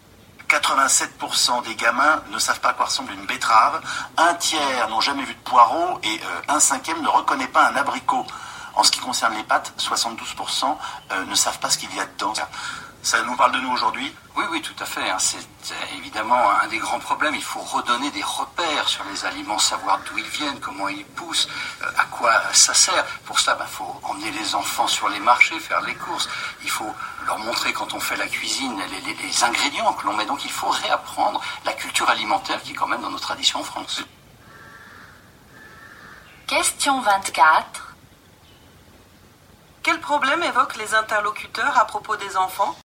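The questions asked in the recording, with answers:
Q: Quel problème évoquent les interlocuteurs à propos des enfants ?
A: Ils ne connaissent pas les aliments et leur origine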